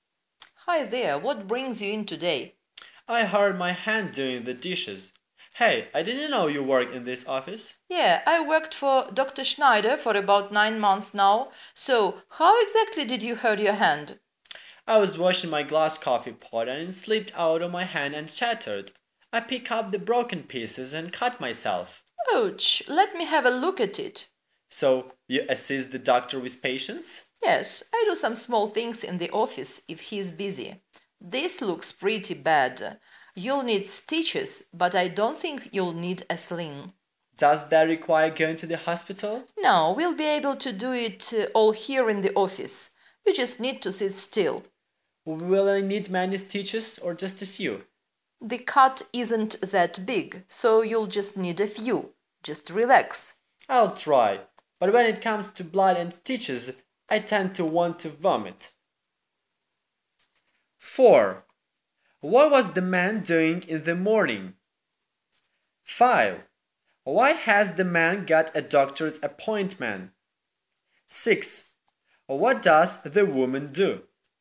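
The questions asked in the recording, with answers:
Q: Why has the man got a doctor's appointment?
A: He cut his hand on a broken coffee pot

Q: What does the woman do?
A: She assists the doctor with patients in his office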